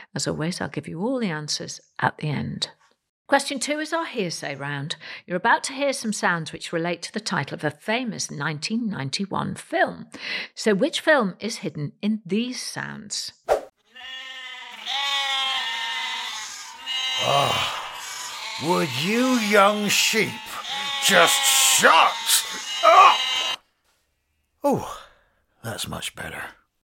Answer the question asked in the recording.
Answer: The answer is The Silence of the Lambs.